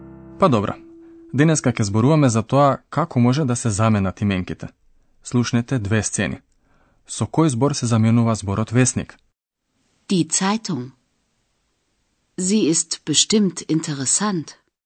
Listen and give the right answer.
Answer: Зборот вестник се заменува со заменката зи.